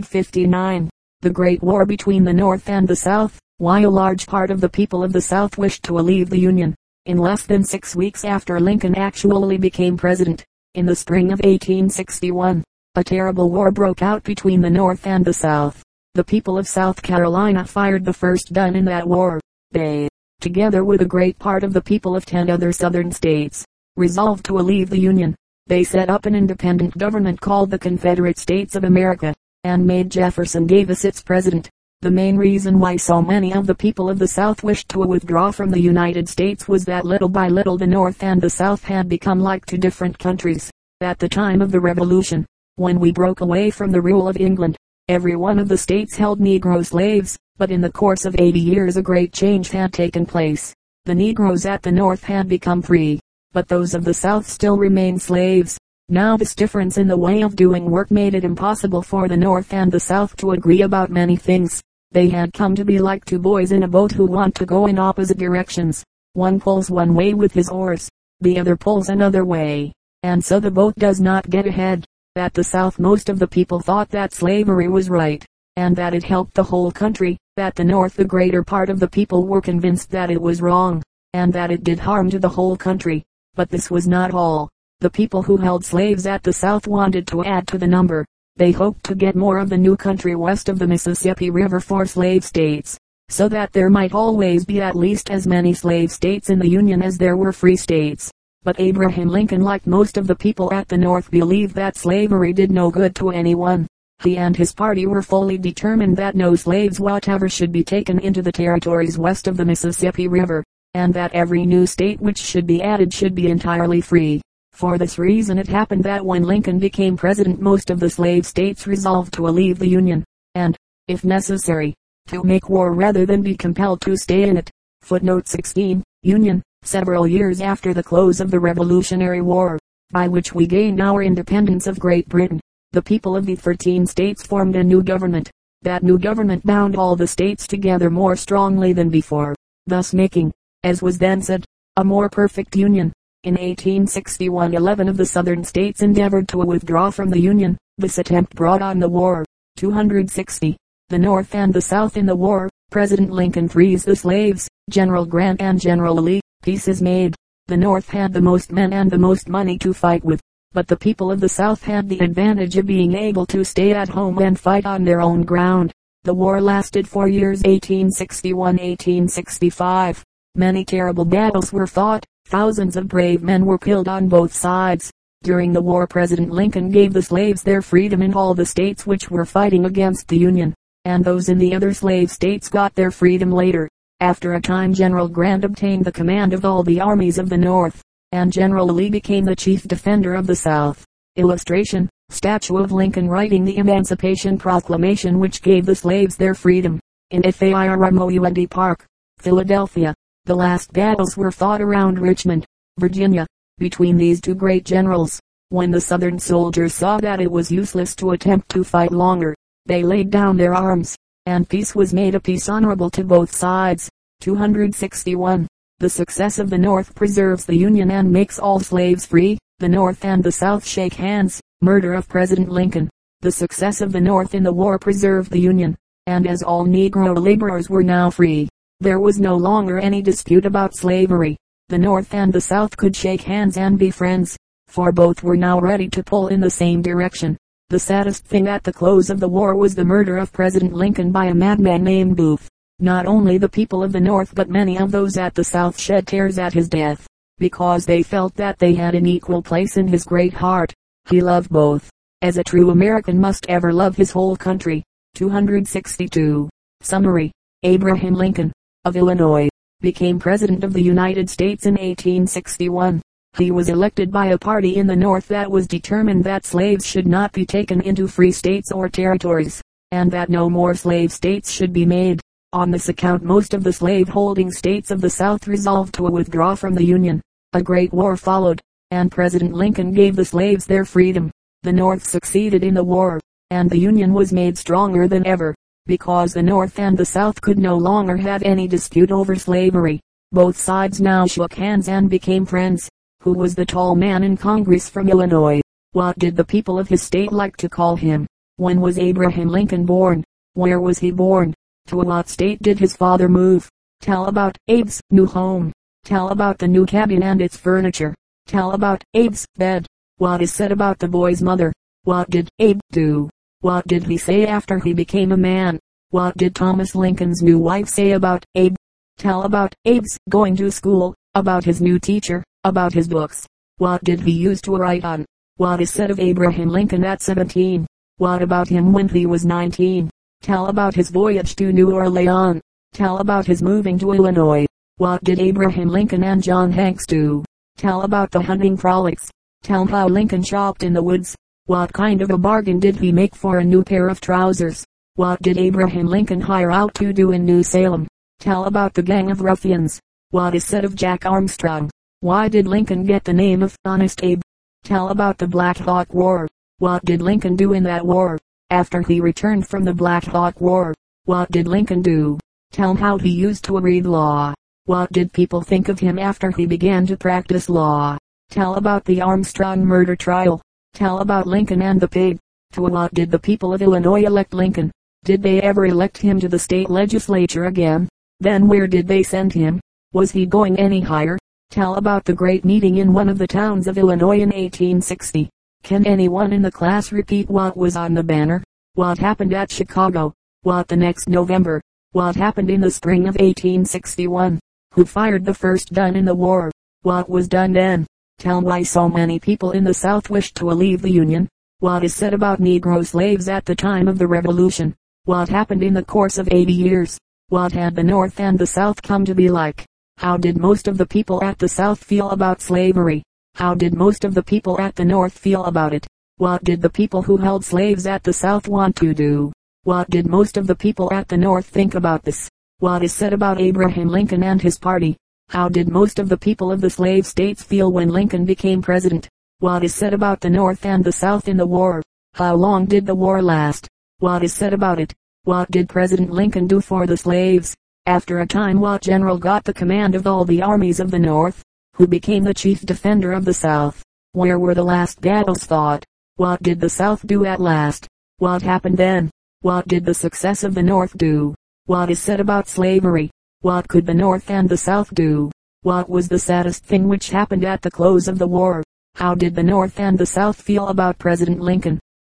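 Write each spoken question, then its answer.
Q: Who fired the first gun in the war?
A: The people of South Carolina

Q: What had the North and the South come to be like?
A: Like two different countries, or like two boys in a boat who want to go in opposite directions

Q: How did most of the people at the South feel about slavery?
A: They thought it was right and helped the whole country

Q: How did most of the people at the North feel about it?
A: They thought it was wrong and did harm to the whole country

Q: How long did the war last?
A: Four years (1861-1865)

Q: After a time, what general got the command of all the armies of the North?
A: General Grant

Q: Who became the chief defender of the South?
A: General Lee

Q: Where were the last battles fought?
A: Around Richmond, Virginia

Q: What was the saddest thing which happened at the close of the war?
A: The murder of President Lincoln by a madman named Booth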